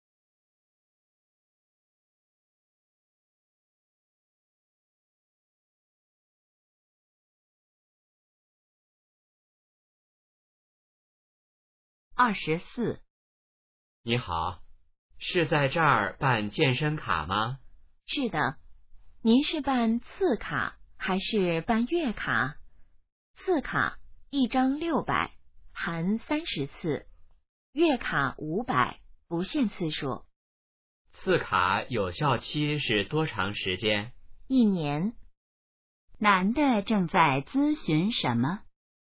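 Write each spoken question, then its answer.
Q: 男的正在咨询什么?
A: 办健身卡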